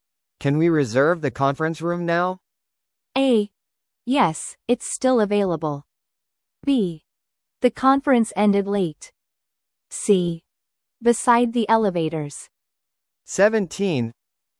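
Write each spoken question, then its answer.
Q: Can we reserve the conference room now?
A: A: Yes, it's still available.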